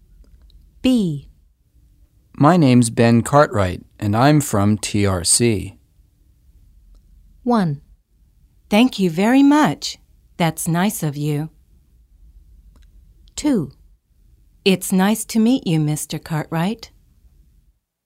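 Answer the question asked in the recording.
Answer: 2: It's nice to meet you, Mr. Cartwright.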